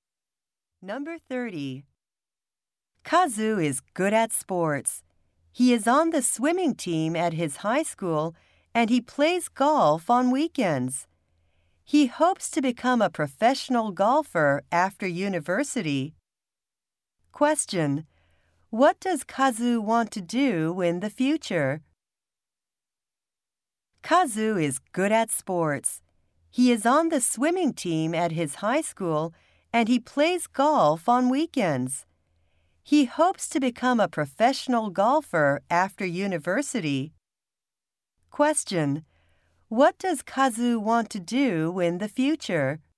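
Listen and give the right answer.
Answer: Become a professional golfer.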